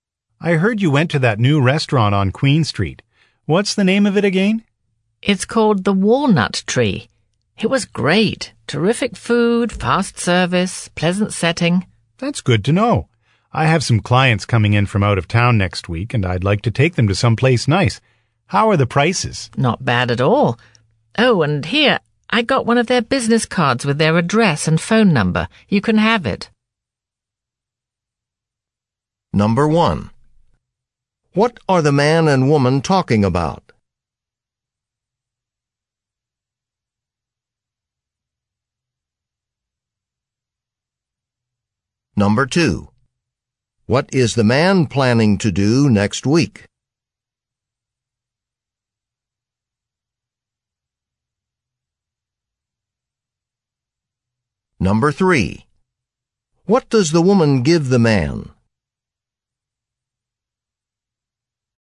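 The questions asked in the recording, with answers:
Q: What are the man and woman talking about?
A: A new restaurant (the Walnut Tree)

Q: What is the man planning to do next week?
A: Take out-of-town clients to a nice restaurant

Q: What does the woman give the man?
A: The restaurant's business card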